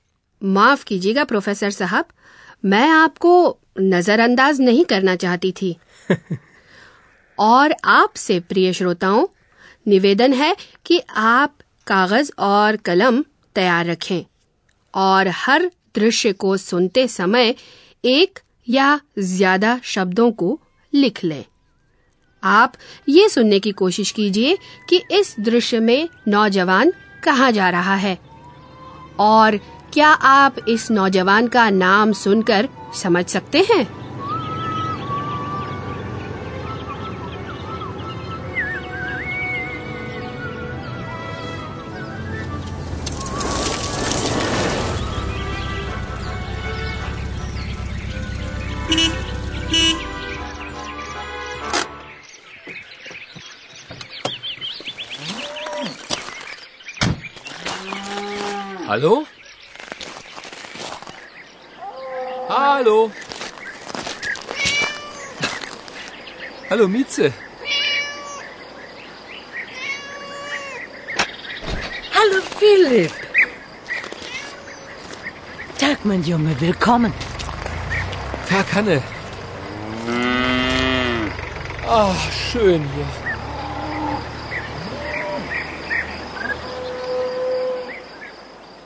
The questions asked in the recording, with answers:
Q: क्या आप इस नौजवान का नाम सुनकर समझ सकते हैं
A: शायद आपने यह भी सुन लिया होगा कि नौजवान का नाम Philip है